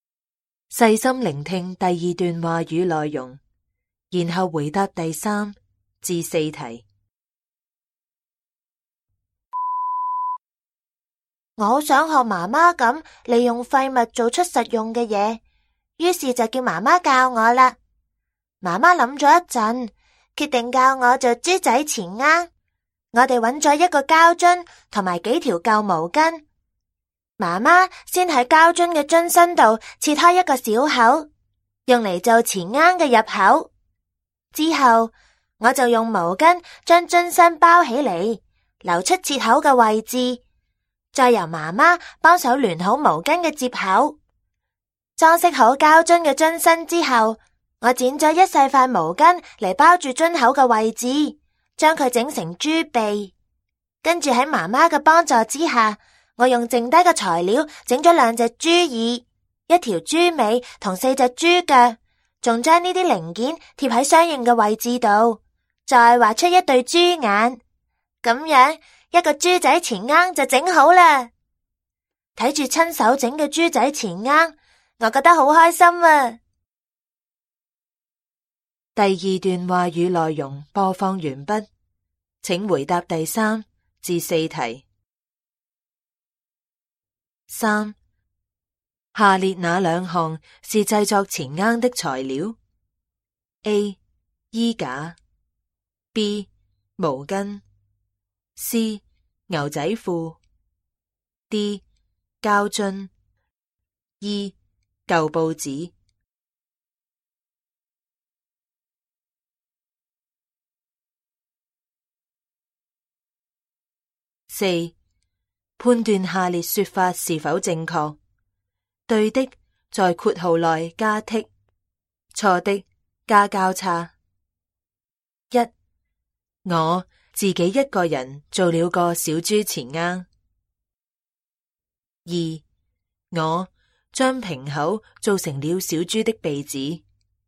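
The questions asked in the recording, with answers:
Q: 三,下列哪两项是制作前鸭的材料 ?A. 衣架 ,B. 毛巾 ,C. 牛仔裤 ,D. 胶樽 ,E. 旧报纸。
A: B: 毛巾;D: 胶樽

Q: 一,我自己一个人做了个小猪前鸭。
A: 错(×),是妈妈帮忙一起做的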